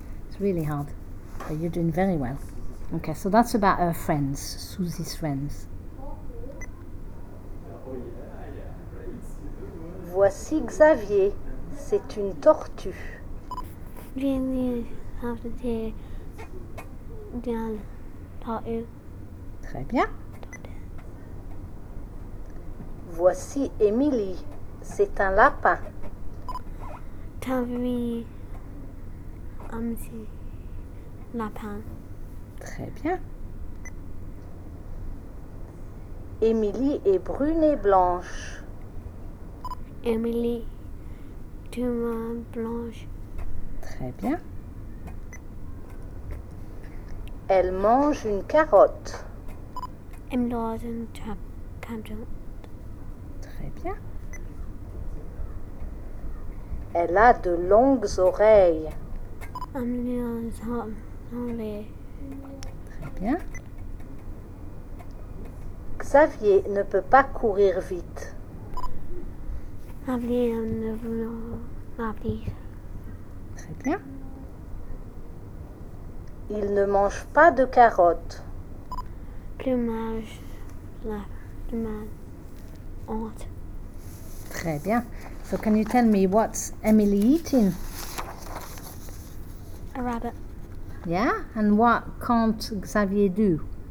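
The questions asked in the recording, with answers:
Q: So can you tell me what's Emily eating?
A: A carrot

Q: And what can't Xavier do?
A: Run fast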